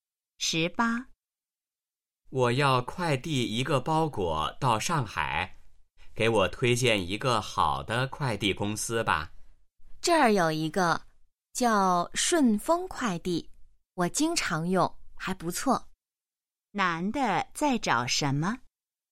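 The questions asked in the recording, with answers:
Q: 男的在找什么?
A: 好的快递公司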